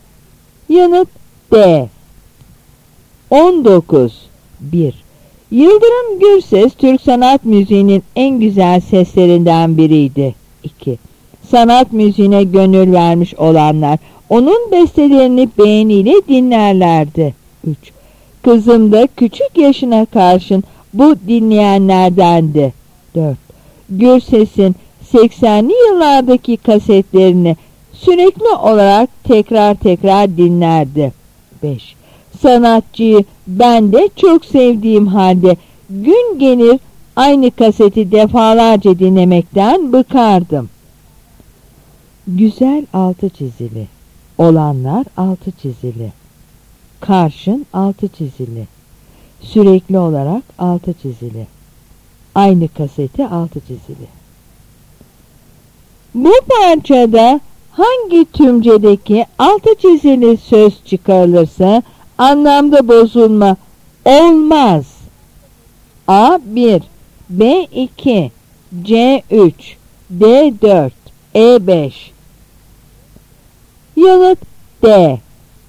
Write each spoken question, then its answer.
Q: Bu parçada hangi tümcedeki altı çizili söz çıkarılırsa anlamda bozulma olmaz.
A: Yanıt D.